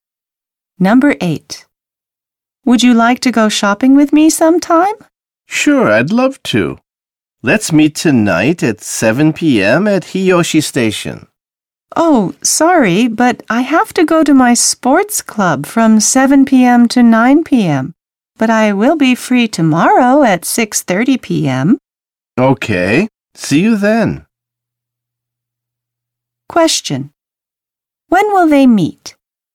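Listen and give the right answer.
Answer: Tomorrow at 6:30 p.m.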